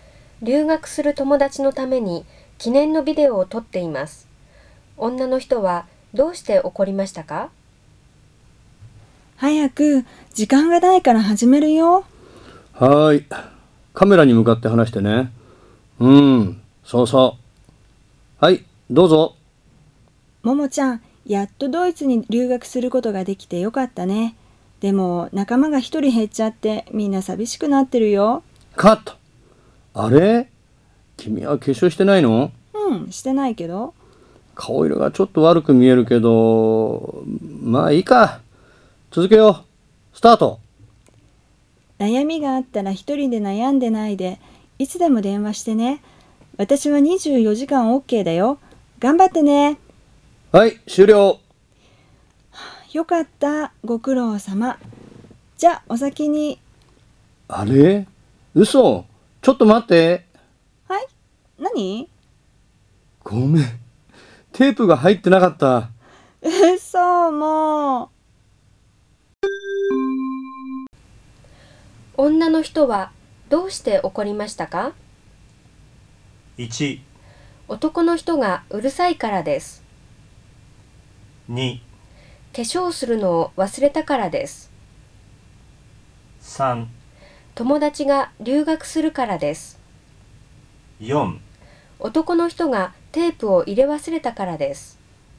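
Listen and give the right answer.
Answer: 4: 男の人がテープを入れ忘れたからです。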